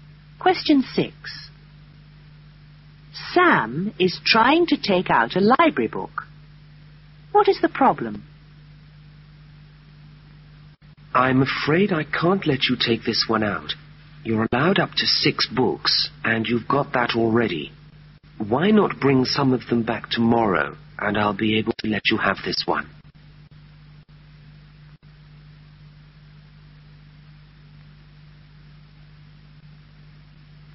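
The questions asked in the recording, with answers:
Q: What is the problem?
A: He already has the maximum of 6 books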